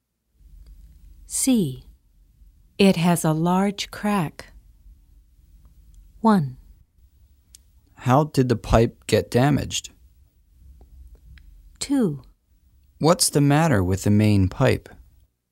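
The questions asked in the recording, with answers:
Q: It has a large crack.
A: 2: What's the matter with the main pipe?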